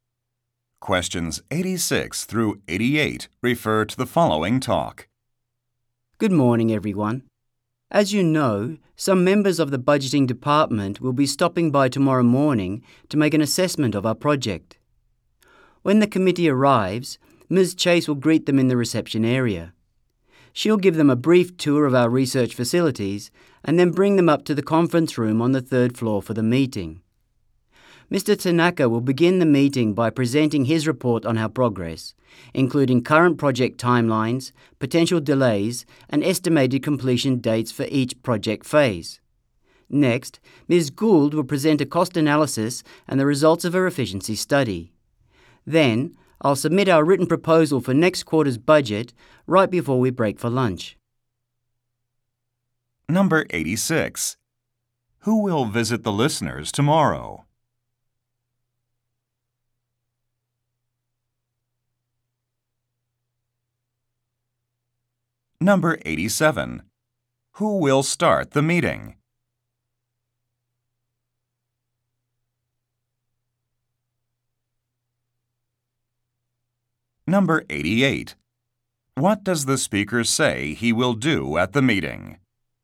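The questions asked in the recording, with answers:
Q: Who will visit the listeners tomorrow?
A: Members of the budgeting department

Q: Who will start the meeting?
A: Mr. Tanaka

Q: What does the speaker say he will do at the meeting?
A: Submit the budget proposal for next quarter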